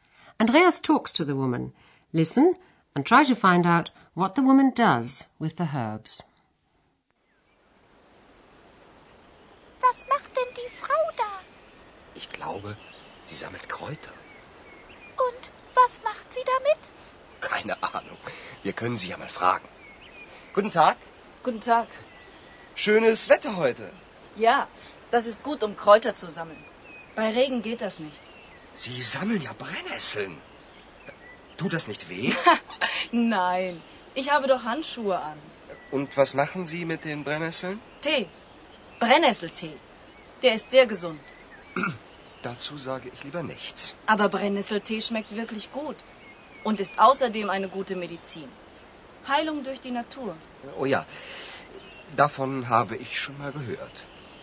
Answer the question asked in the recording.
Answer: Andreas discovers that the woman makes tea from the nettles.